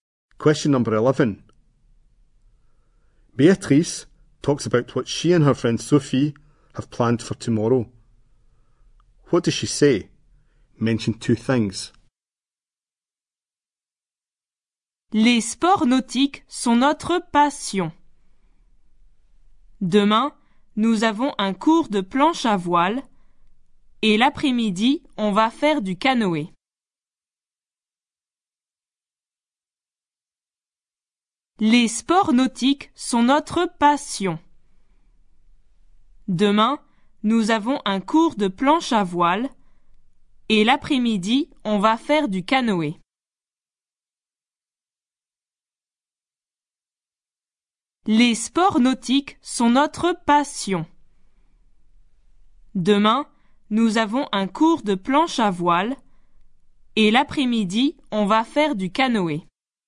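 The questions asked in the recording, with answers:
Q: What does she say? Mention two things.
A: A windsurfing lesson tomorrow; canoeing in the afternoon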